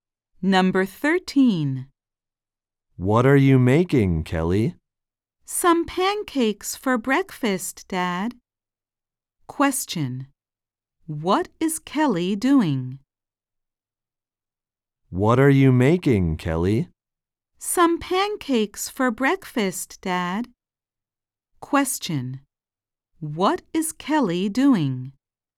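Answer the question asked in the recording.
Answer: Making pancakes for breakfast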